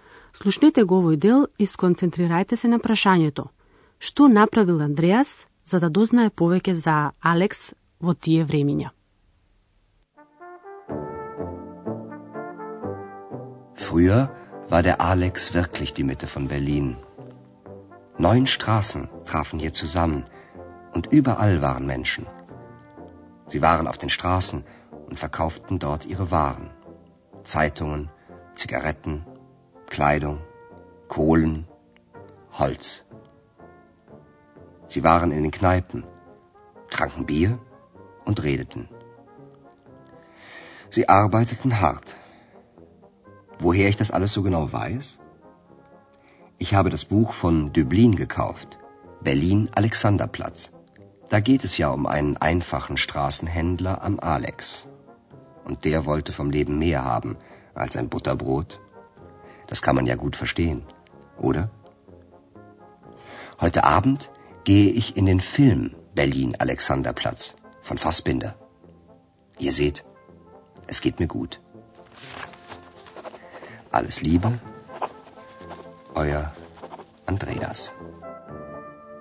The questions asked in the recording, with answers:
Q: Што направил Андреас за да дознае повеќе за Алекс во тие времиња?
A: За да дознае повеќе за поранешниот живот на Алекс, тој си ја купил познатата книга од Дублин, Берлин, Александарплац.